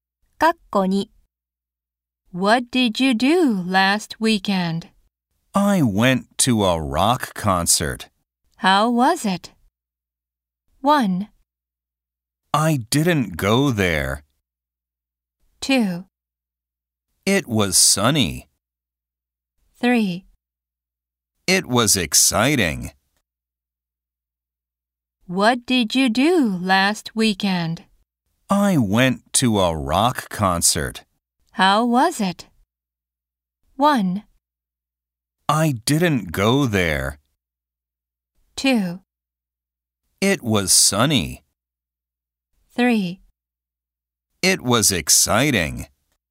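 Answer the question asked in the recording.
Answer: 3: It was exciting.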